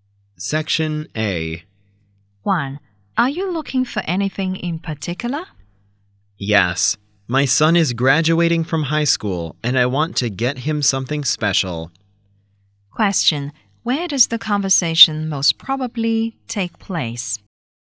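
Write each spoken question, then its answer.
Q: Where does the conversation most probably take place?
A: In a shop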